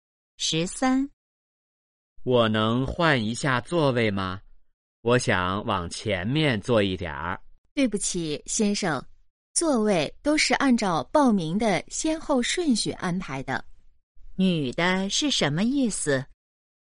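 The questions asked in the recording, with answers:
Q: 女的是什么意思?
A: 不能换座位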